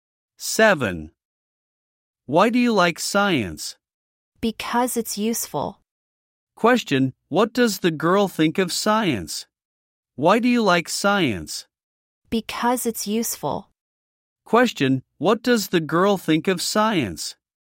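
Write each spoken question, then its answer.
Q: Question, what does the girl think of science?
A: It's useful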